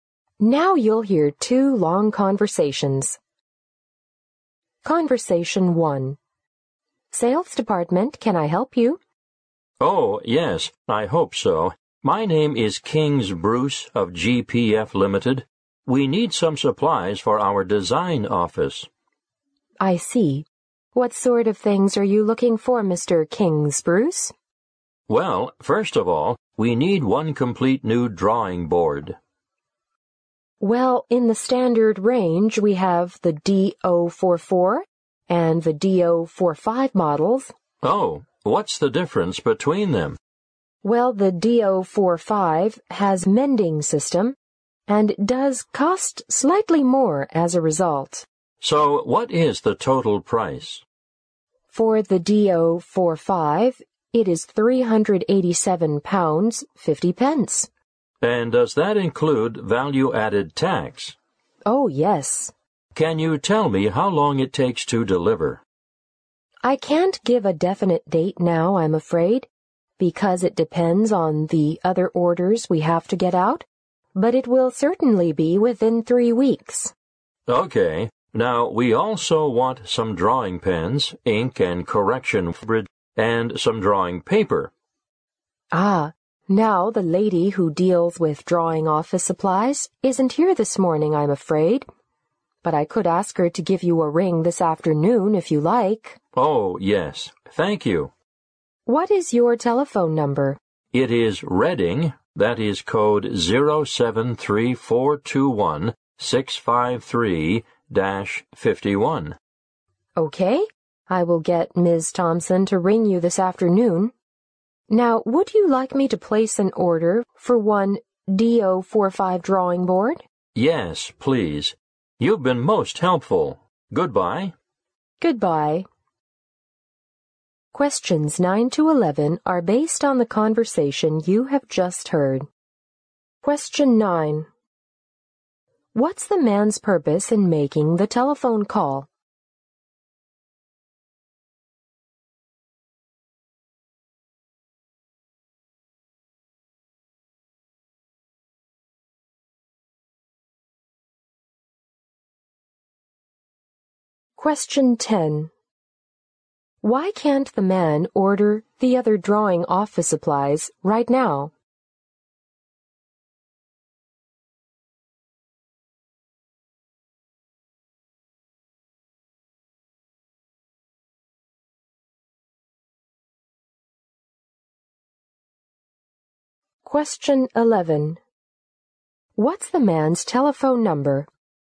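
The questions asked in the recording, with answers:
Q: What's the man's purpose in making the telephone call?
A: To order supplies for his design office

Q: Why can't the man order the other drawing office supplies right now?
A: The woman who deals with them isn't there this morning

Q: What's the man's telephone number?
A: Reading, 073-421-653-51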